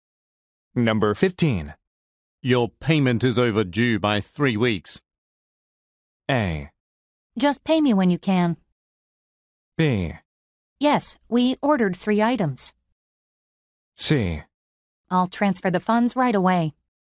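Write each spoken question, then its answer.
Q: Your payment is overdue by 3 weeks.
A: C: I'll transfer the funds right away.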